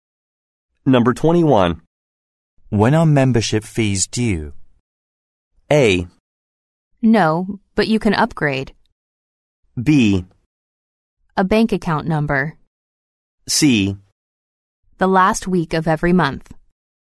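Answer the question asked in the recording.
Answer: C: The last week of every month.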